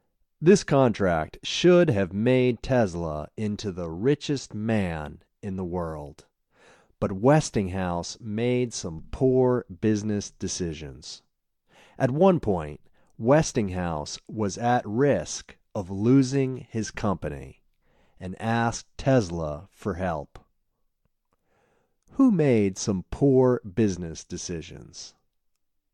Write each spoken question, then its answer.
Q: Who made some poor business decisions?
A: Westinghouse made some poor business decisions.